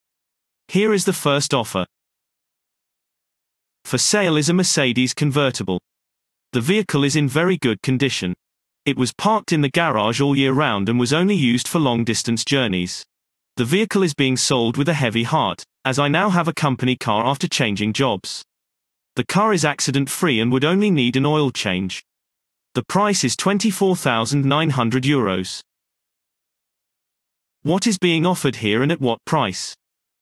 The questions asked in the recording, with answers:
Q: What is being offered here and at what price?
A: Answer. A car is being sold at a price of €24,900.